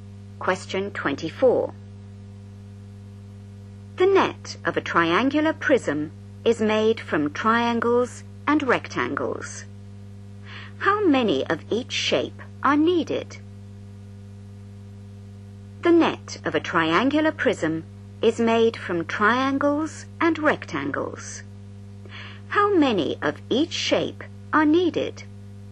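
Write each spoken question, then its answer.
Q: How many of each shape are needed?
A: 2 triangles and 3 rectangles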